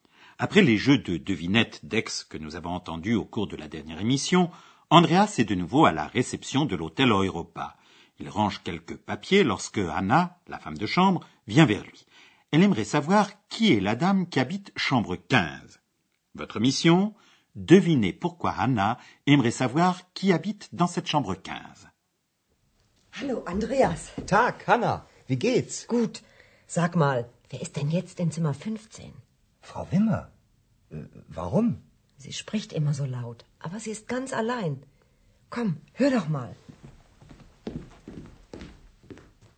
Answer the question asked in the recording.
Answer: Hanna aimerait savoir qui habite chambre 15, parce qu'elle a remarqué qu'une femme y parle toujours à voix haute.